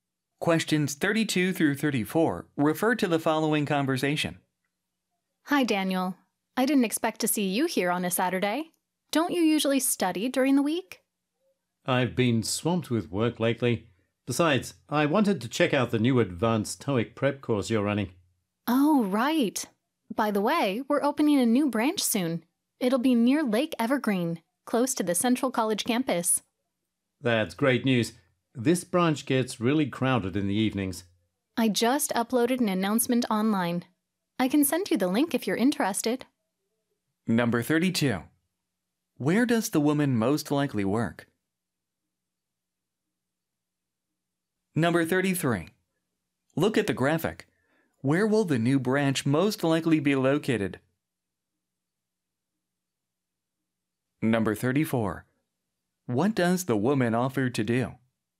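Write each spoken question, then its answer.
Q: Where does the woman most likely work?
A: At a TOEIC prep school (language academy)

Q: What does the woman offer to do?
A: Send a link to the online announcement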